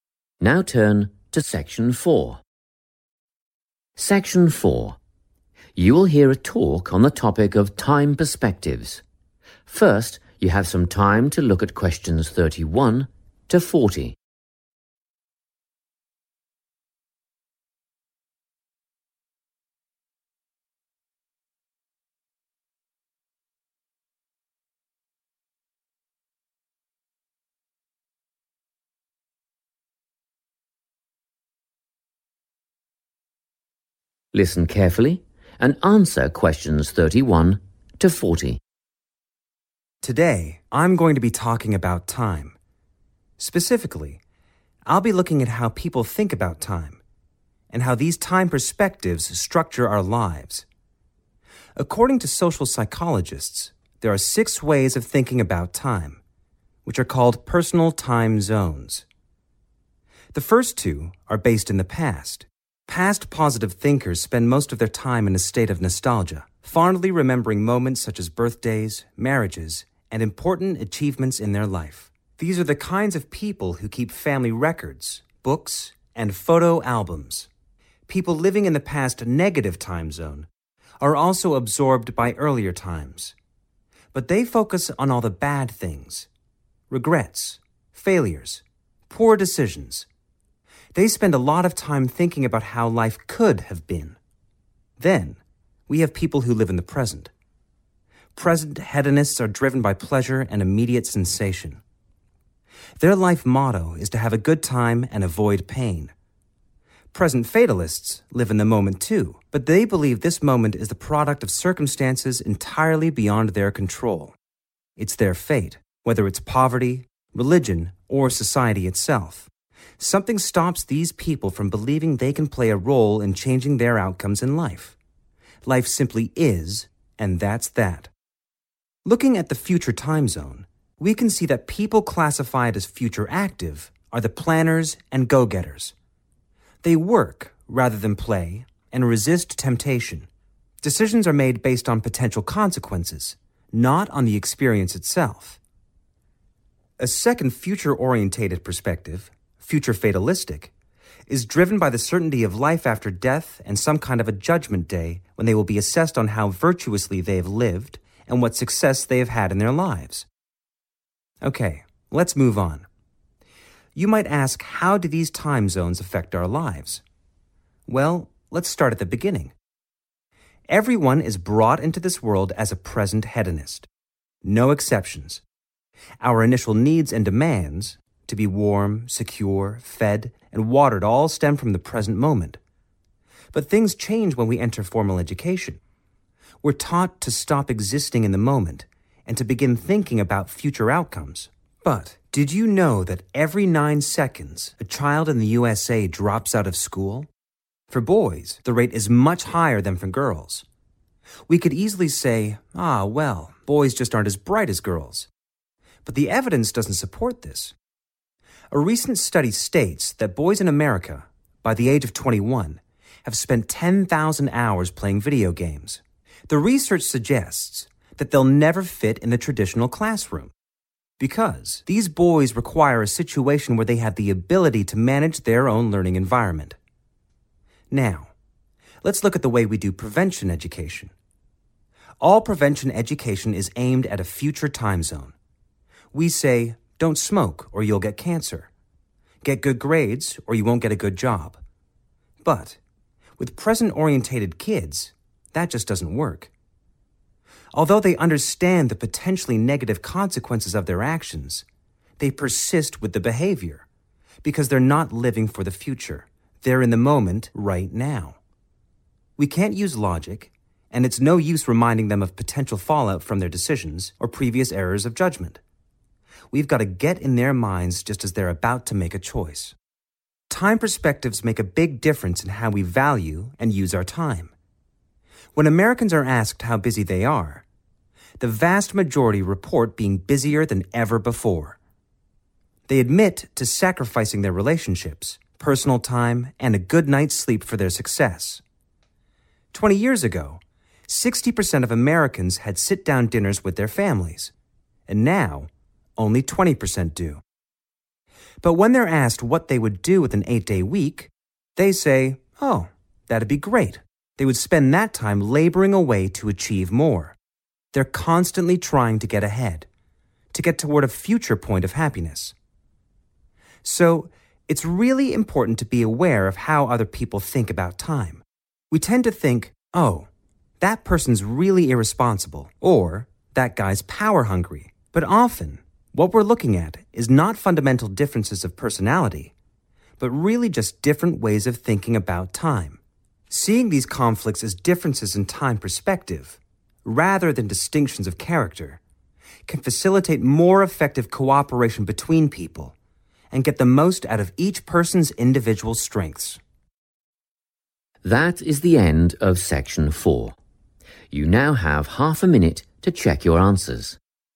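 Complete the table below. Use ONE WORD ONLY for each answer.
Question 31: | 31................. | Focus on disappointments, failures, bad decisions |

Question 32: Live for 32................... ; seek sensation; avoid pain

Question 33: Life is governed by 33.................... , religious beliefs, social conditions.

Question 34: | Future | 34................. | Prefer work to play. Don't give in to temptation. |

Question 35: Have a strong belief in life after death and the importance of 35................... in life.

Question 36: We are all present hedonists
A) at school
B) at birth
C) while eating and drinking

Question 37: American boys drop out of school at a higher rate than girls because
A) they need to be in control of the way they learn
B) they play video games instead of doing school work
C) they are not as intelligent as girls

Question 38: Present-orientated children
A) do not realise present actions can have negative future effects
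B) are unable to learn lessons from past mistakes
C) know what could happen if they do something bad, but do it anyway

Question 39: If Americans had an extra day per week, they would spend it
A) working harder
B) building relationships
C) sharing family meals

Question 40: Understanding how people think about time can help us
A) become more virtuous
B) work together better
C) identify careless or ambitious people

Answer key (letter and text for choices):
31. Negative
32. pleasure
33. poverty
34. Active
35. success
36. B) at birth
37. A) they need to be in control of the way they learn
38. C) know what could happen if they do something bad, but do it anyway
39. A) working harder
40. B) work together better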